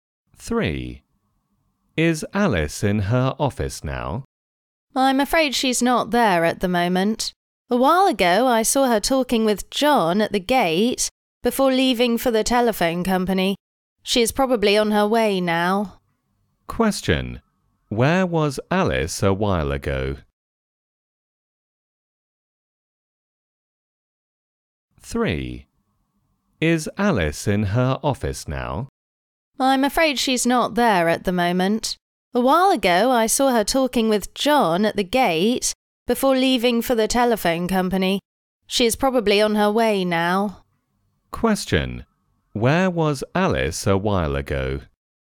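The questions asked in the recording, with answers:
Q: Question. Where was Alice a while ago?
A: At the gate, talking with John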